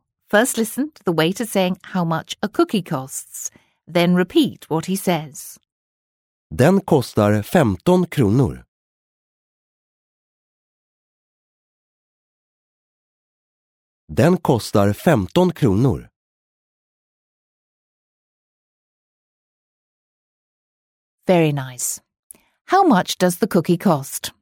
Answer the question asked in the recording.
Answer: He said that it costs 15 kronor.